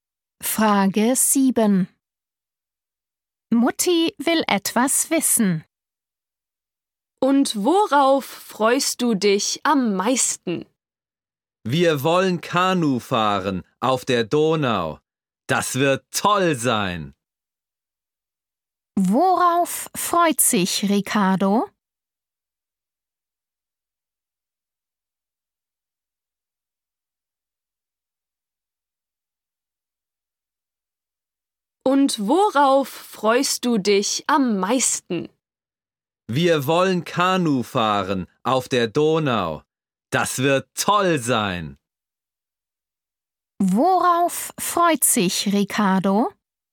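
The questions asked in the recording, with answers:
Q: Worauf freut sich Ricardo?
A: auf Kanufahren auf der Donau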